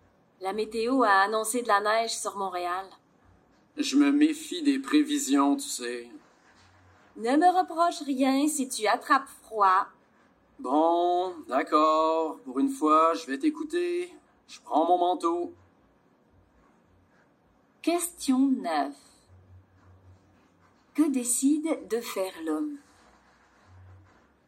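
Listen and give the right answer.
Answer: Prendre son manteau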